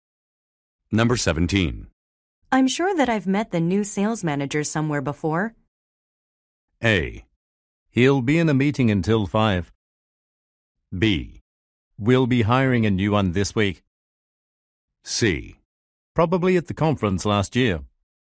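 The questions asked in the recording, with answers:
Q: I'm sure that I've met the new sales manager somewhere before.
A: C: Probably at the conference last year.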